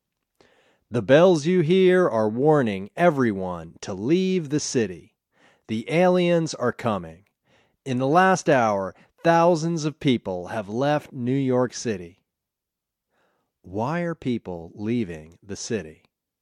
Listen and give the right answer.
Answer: They are leaving the city because the aliens are coming.